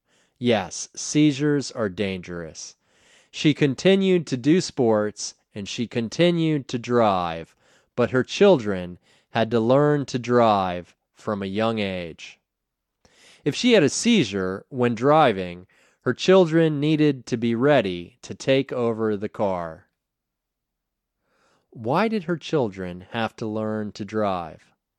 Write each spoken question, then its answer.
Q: Why did her children have to learn to drive?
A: If she had a seizure when driving, her children needed to be ready to take over the car.